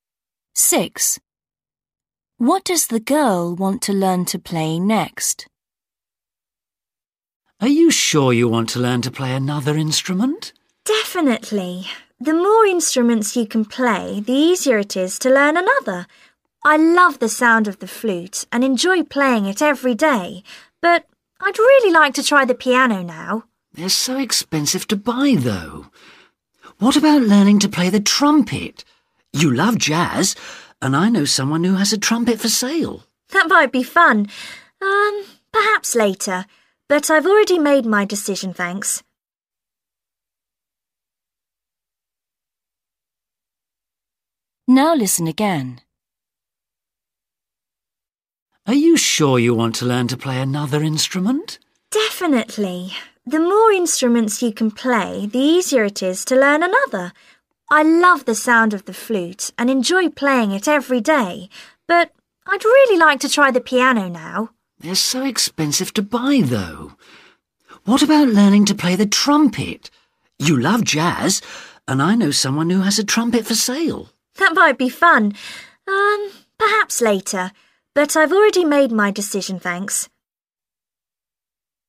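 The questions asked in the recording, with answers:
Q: What does the girl want to learn to play next?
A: the piano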